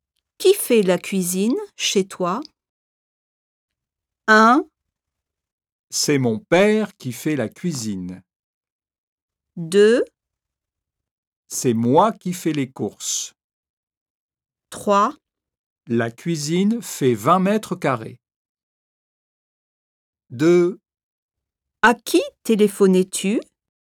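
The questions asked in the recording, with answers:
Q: Qui fait la cuisine chez toi?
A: 1: C'est mon père qui fait la cuisine.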